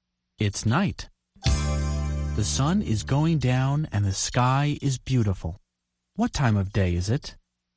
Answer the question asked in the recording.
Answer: It's evening.